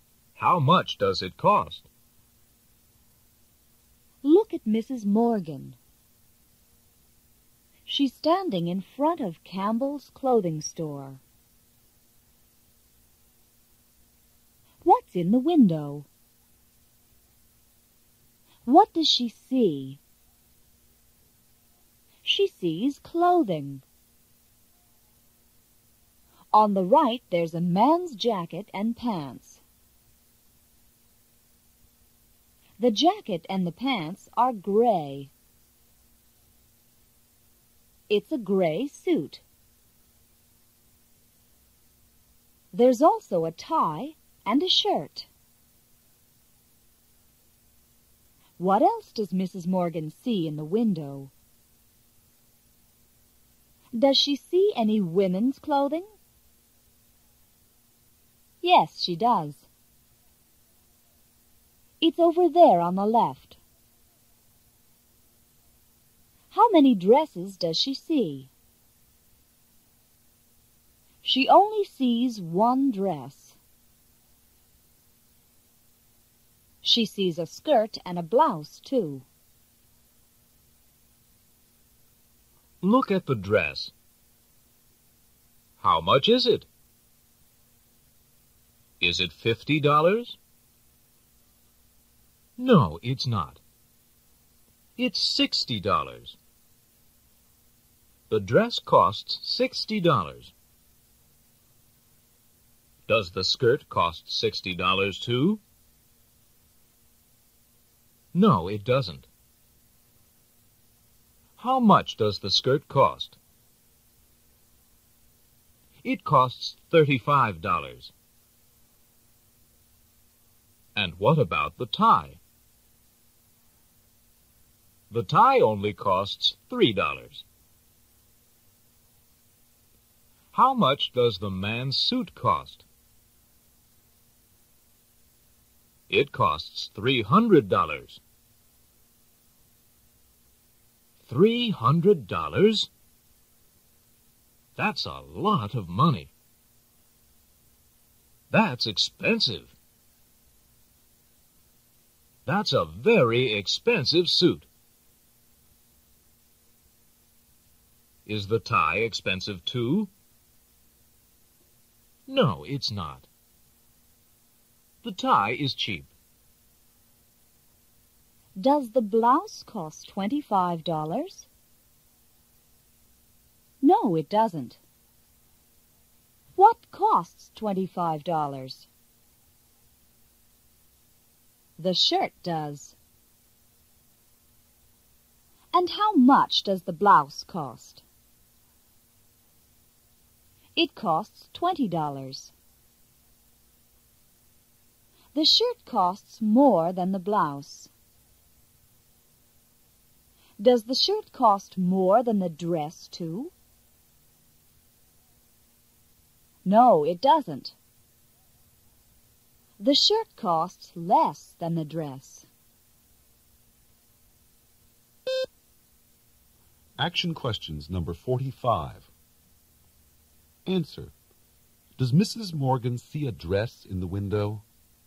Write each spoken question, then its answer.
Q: Does Mrs. Morgan see a dress in the window?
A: Yes, she does.